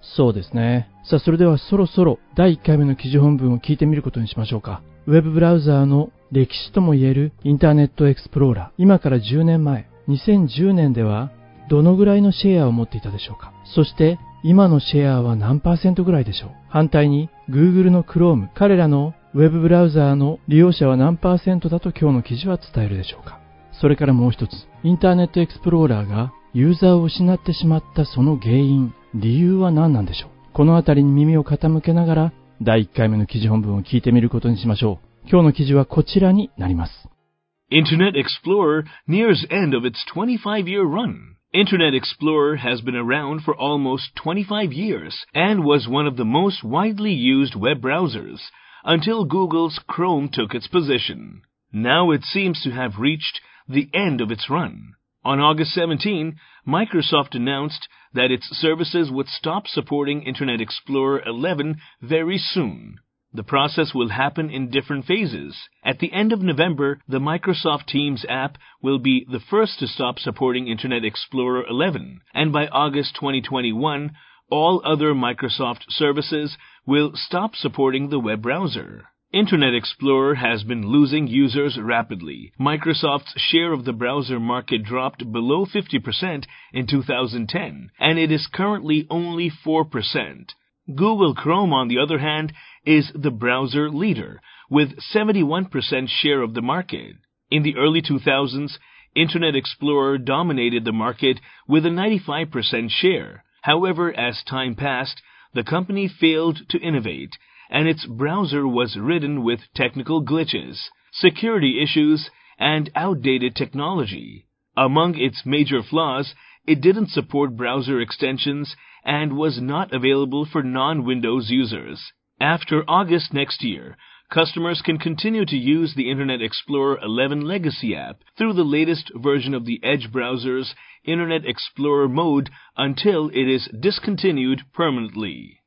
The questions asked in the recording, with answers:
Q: 今から10年前、2010年ではどのぐらいのシェアを持っていたでしょうか。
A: 50% を割ってしまっていたんです。

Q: そして、今のシェアは何パーセントぐらいでしょう。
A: 今はたった 4% だそうです。

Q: 反対に、Google の Chrome、彼らのウェブブラウザーの利用者は何パーセントだと今日の記事は伝えるでしょうか。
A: IE が 4%、Chrome は 71% のマーケットシェアなんですね。